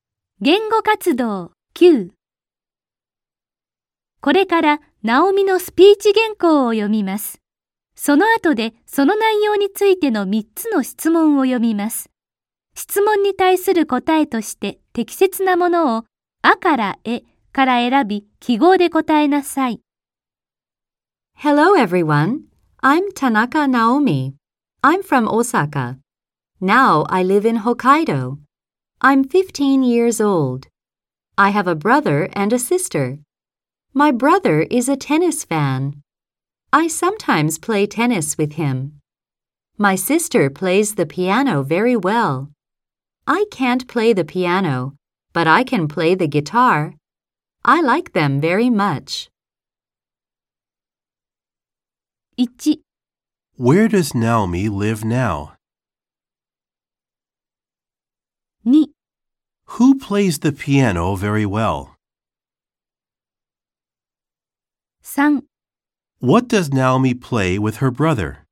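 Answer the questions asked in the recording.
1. In Hokkaido
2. Her sister
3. Tennis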